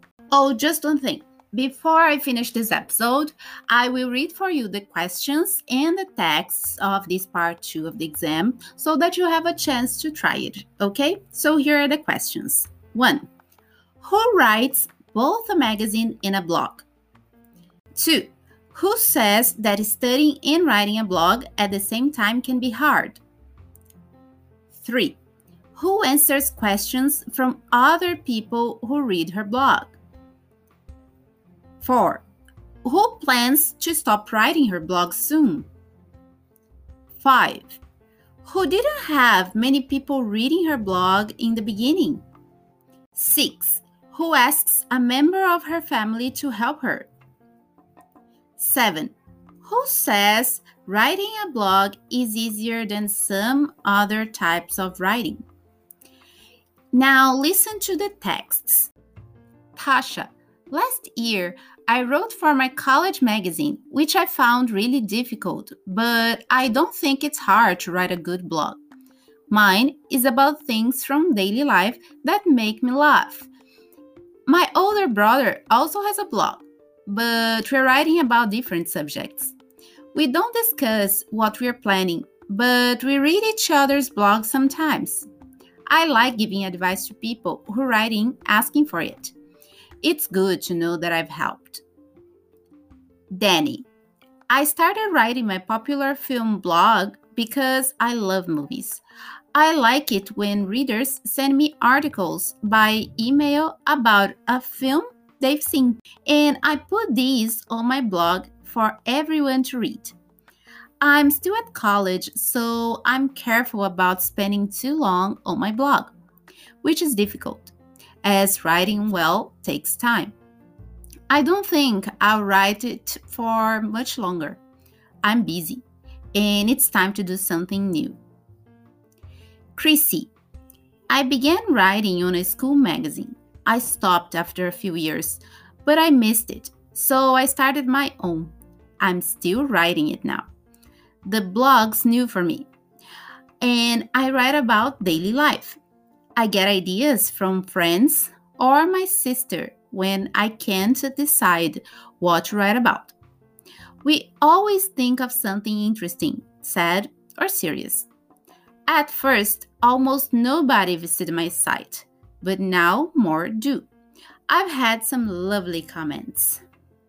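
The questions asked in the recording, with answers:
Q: Who says that studying and writing a blog at the same time can be hard?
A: Danny

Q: Who answers questions from other people who read her blog?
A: Tasha

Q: Who plans to stop writing her blog soon?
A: Danny

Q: Who didn't have many people reading her blog in the beginning?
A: Chrissy

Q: Who asks a member of her family to help her?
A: Chrissy

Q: Who says writing a blog is easier than some other types of writing?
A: Tasha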